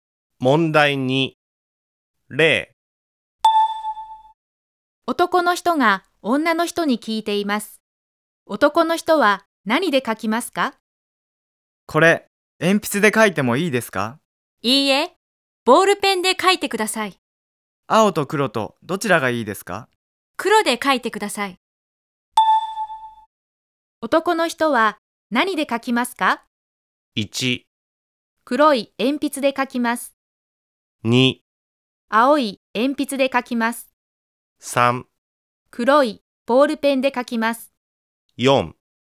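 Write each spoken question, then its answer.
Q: 男の人は何で書きますか?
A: 3: 黒いボールペンで書きます。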